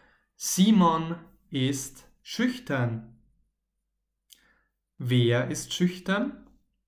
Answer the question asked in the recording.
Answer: Simon Simon ist schüchtern.